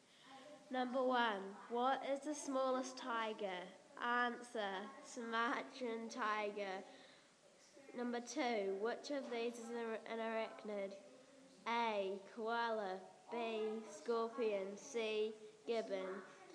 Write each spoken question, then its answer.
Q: which of these is an arachnid?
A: Answer, scorpion.